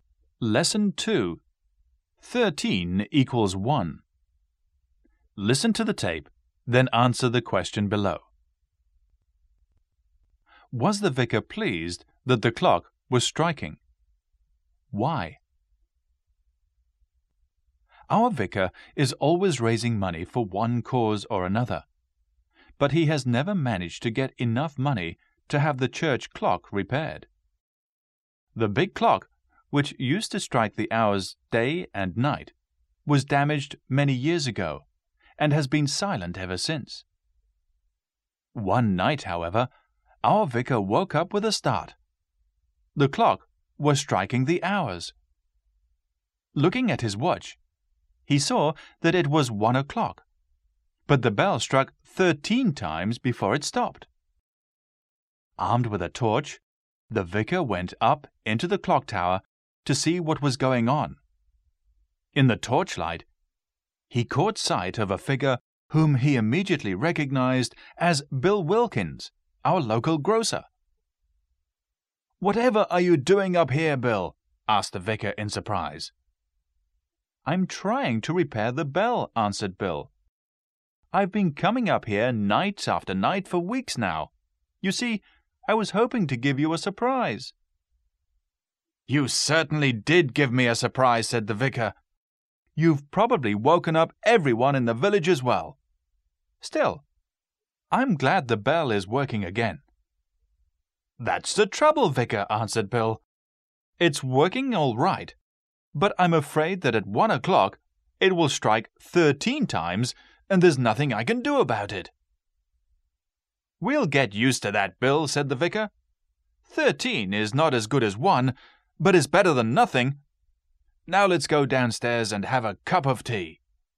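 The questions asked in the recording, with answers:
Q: Was the vicar pleased that the clock was striking?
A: Yes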